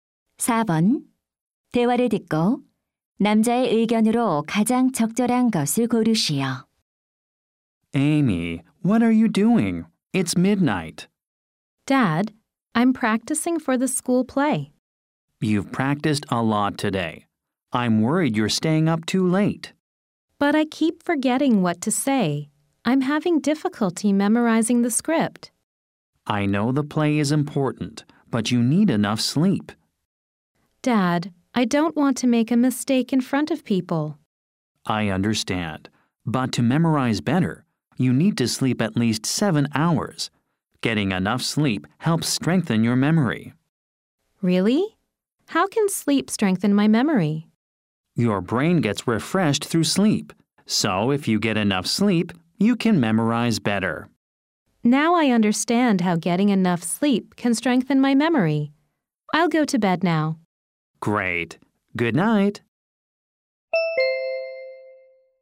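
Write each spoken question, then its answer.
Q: 대화를 듣고 남자의 의견으로 가장 적절한 것을 고르시오.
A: 충분한 수면은 기억력 강화에 도움이 된다.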